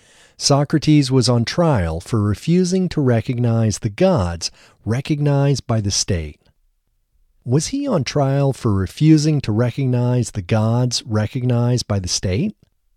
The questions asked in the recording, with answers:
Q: Was he on trial for refusing to recognize the gods recognized by the state?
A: Yes, he was on trial for refusing to recognize the gods recognized by the state.